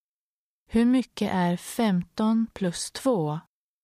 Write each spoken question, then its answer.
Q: Hur mycket är 15 plus 2?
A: 17.